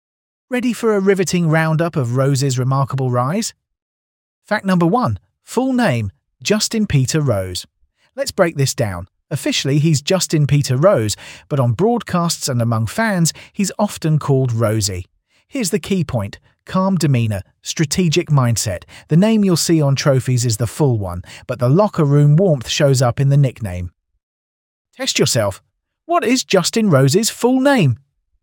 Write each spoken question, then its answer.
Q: What is Justin Rose's full name?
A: Correct answer. Justin Peter Rose.